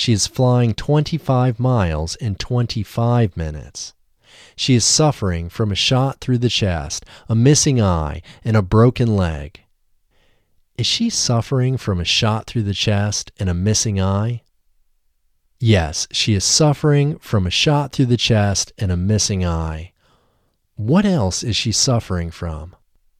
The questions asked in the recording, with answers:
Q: What else is she suffering from?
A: She is also suffering from a broken leg.